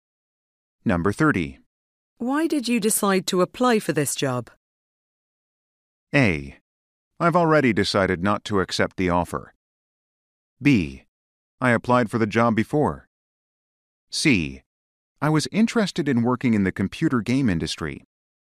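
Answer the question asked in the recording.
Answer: C: I was interested in working in the computer game industry.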